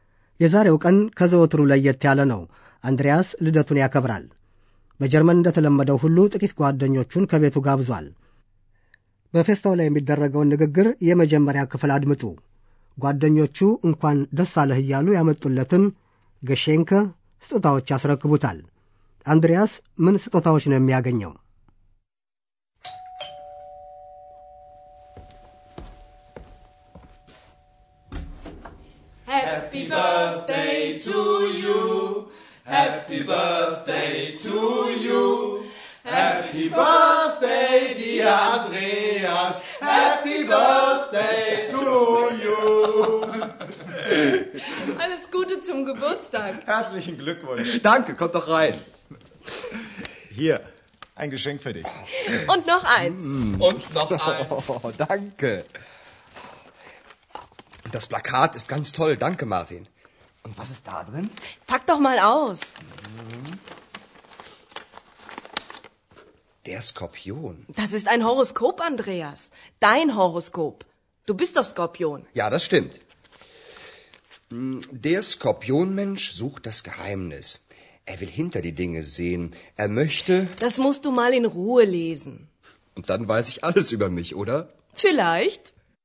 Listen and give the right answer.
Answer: አንዱ ስዕል፣ ሌላው ደግሞ ኮከብ ማውጫ ነው።